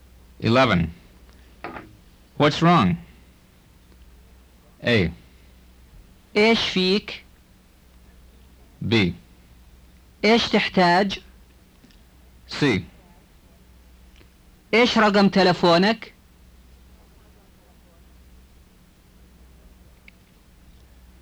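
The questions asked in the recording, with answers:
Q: What's wrong?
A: A: إيش فيك؟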